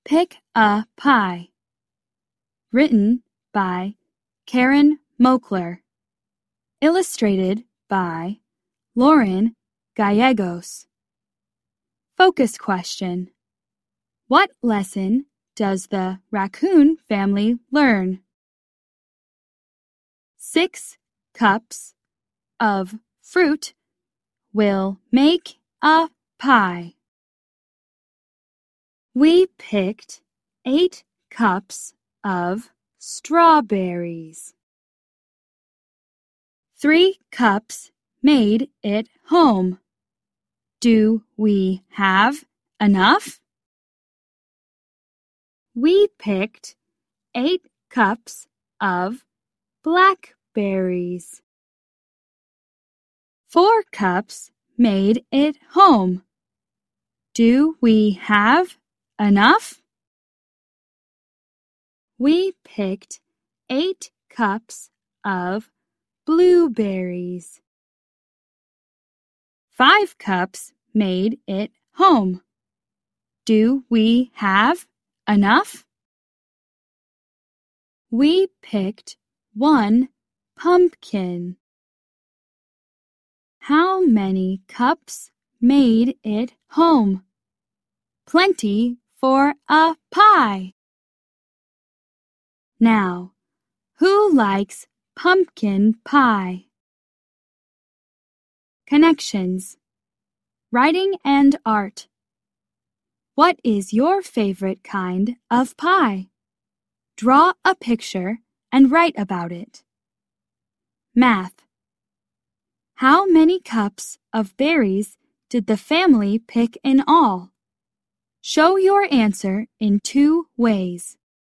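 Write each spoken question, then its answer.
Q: How many cups of berries did the family pick in all?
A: 24 cups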